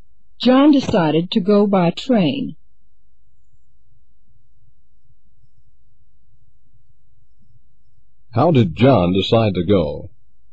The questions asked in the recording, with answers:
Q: How did John decide to go?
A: He decided to go by train.